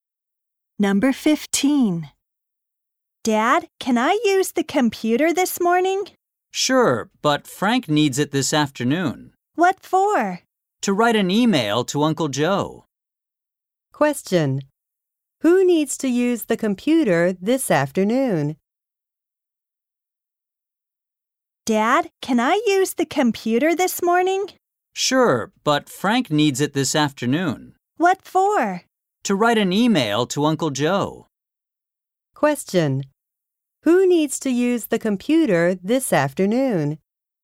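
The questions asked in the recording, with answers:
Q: Who needs to use the computer this afternoon?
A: Frank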